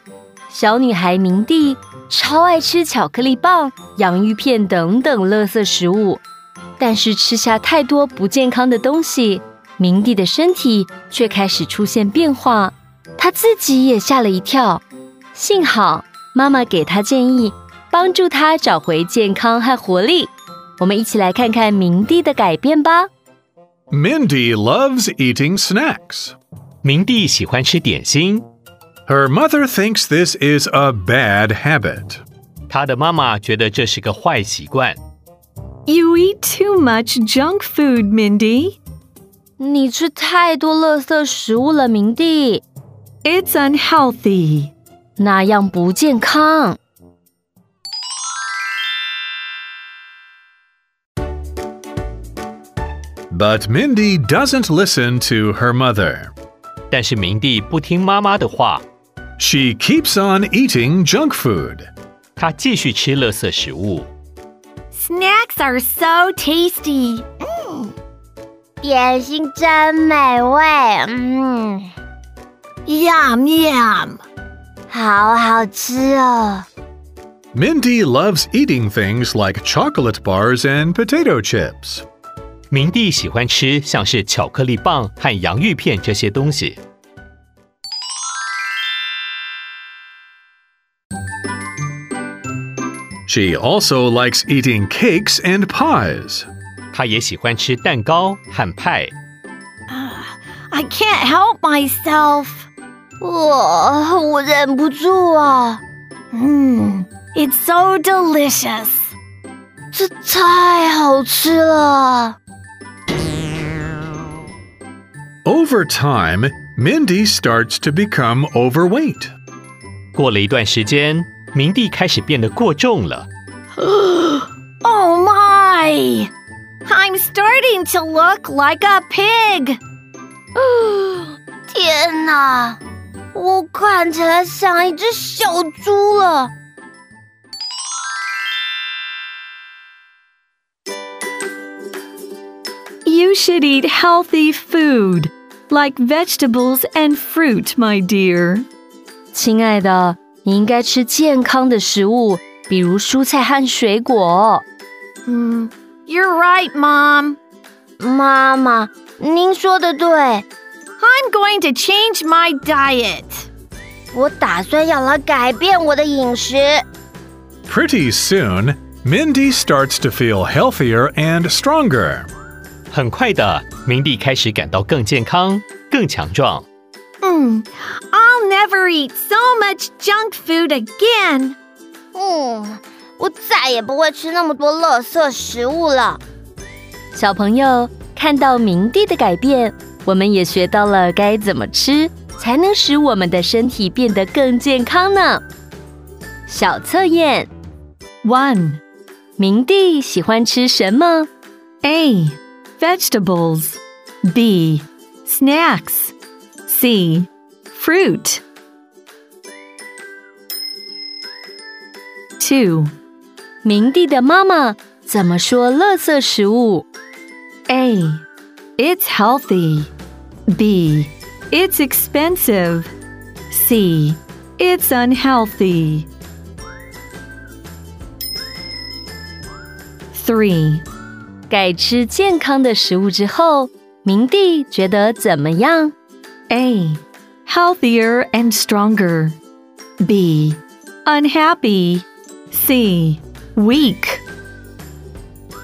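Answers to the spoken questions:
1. B: Snacks.
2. C: It's unhealthy.
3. A: Healthier and stronger.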